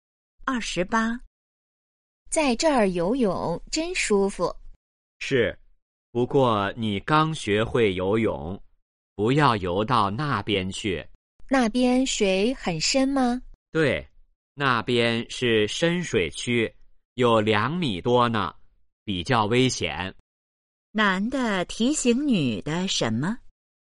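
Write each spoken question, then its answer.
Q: 男的提醒女的什么?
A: 不要游到深水区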